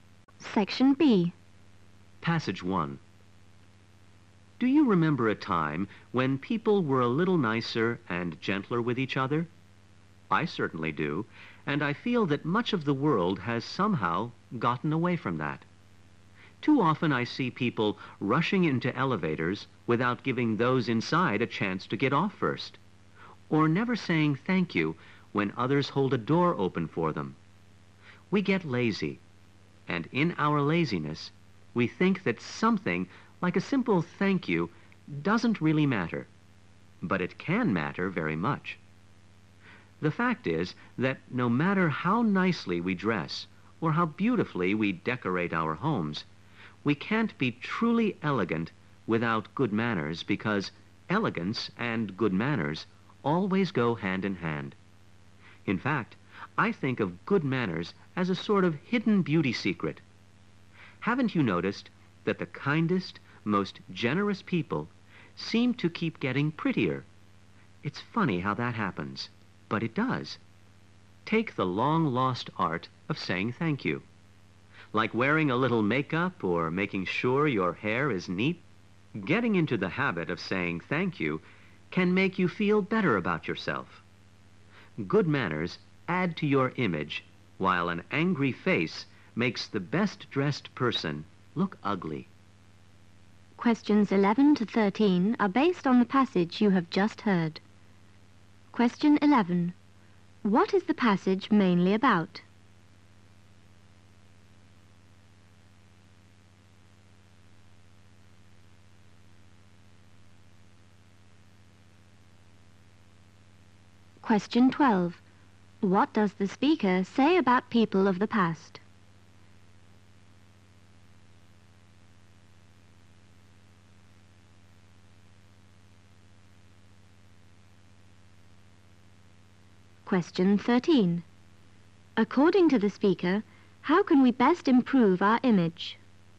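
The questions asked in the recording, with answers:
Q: What is the passage mainly about?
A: The importance of good manners

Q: What does the speaker say about people of the past?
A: They were nicer and gentler with each other.

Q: According to the speaker, how can we best improve our image?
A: By having good manners, such as saying thank you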